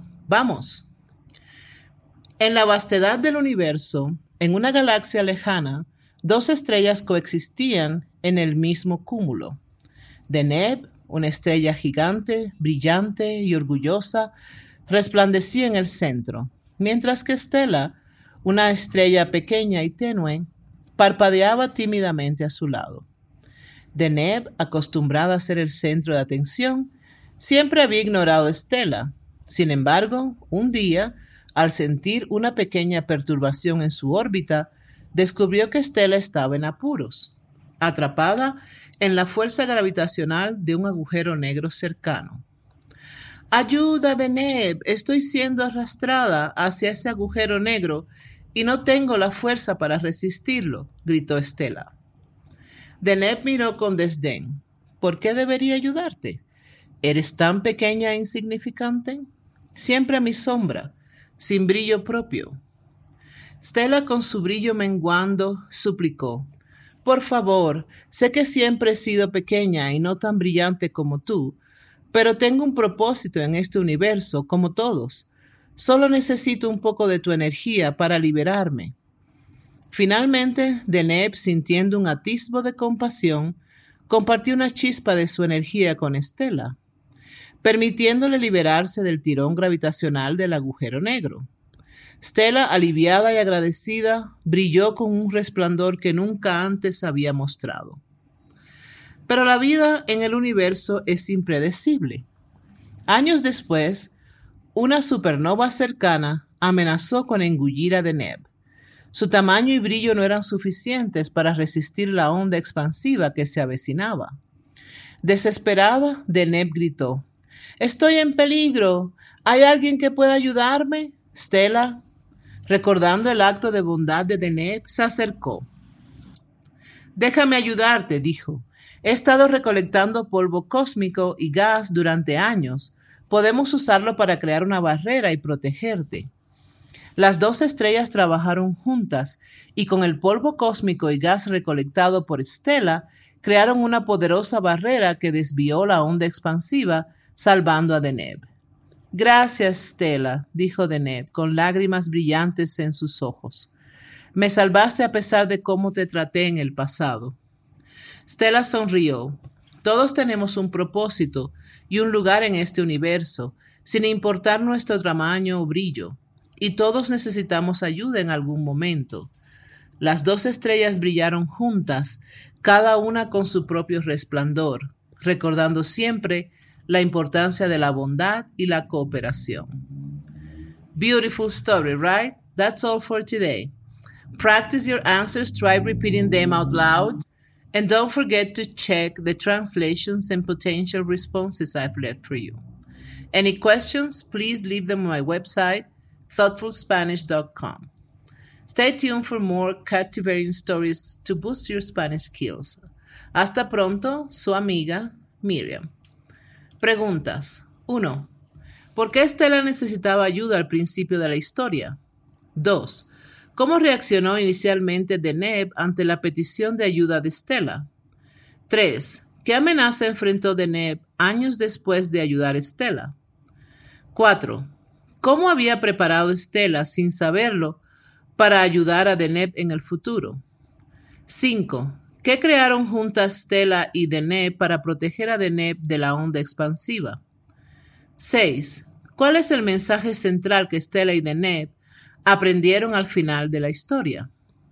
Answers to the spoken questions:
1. Stella necesitaba ayuda porque estaba siendo arrastrada hacia un agujero negro.
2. Deneb inicialmente miró a Stella con desdén y dudó en ayudarla.
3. Deneb enfrentó la amenaza de ser engullida por una supernova cercana.
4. Stella había estado recolectando polvo cósmico y gas durante años.
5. Juntas crearon una barrera usando el polvo cósmico y gas para desviar la onda expansiva.
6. El mensaje central es que todos tienen un propósito y pueden necesitar ayuda en algún momento independientemente de su tamaño o importancia.